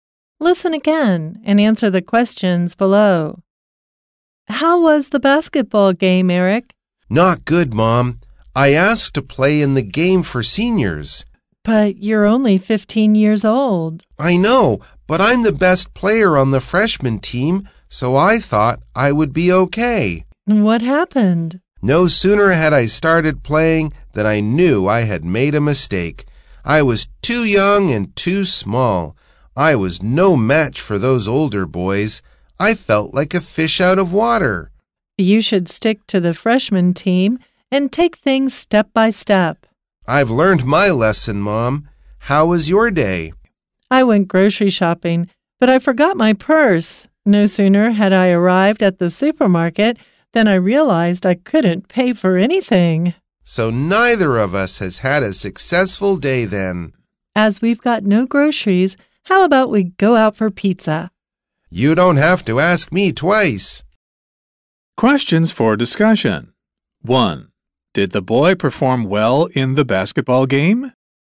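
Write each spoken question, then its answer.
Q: Did the boy perform well in the basketball game?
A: No, he was too young and too small for the older boys.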